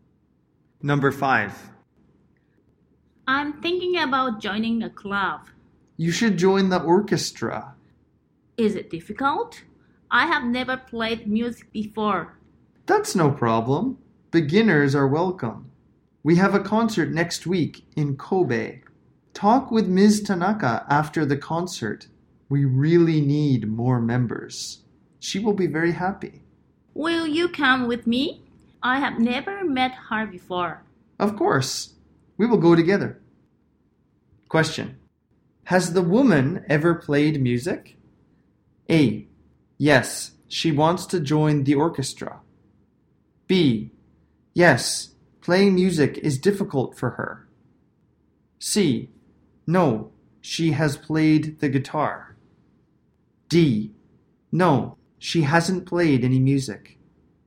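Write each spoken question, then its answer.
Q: Has the woman ever played music?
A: D: No, she hasn't played any music.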